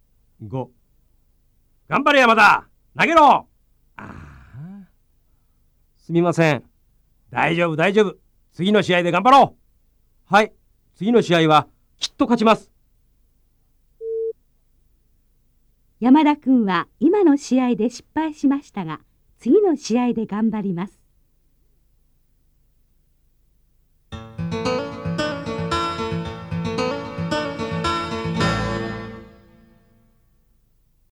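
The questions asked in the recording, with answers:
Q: 山田君は今の試合で失敗しましたが、次の試合で頑張ります。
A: ○(正しい)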